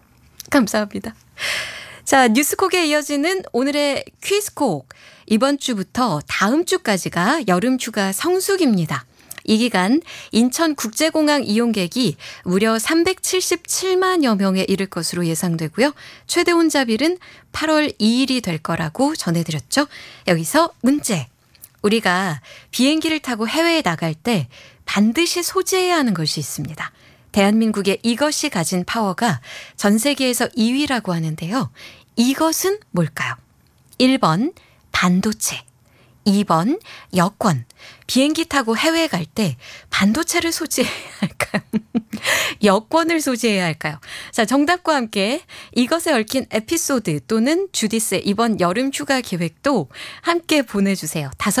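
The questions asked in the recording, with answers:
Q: 이것은 뭘까요? 1번 반도체, 2번 여권, 비행기 타고 해외에 갈 때 반도체를 소지해야 할까요?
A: 2: 여권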